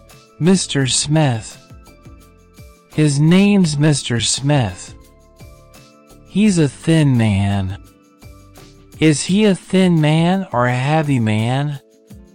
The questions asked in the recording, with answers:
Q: Is he a thin man or a heavy man?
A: A thin man.